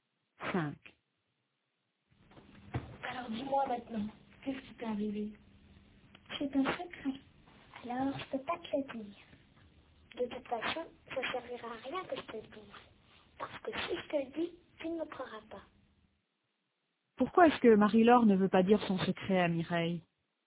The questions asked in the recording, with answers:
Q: Pourquoi est-ce que Marie-Laure ne veut pas dire son secret à Mireille?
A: Parce qu'elle pense que Mireille ne la croira pas.